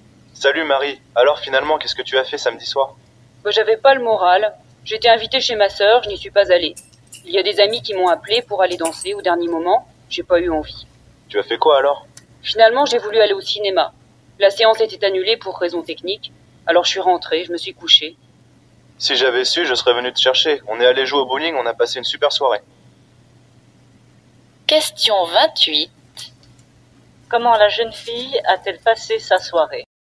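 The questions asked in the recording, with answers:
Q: Comment la jeune fille a-t-elle passé sa soirée?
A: Elle est rentrée chez elle et s'est couchée (la séance de cinéma était annulée).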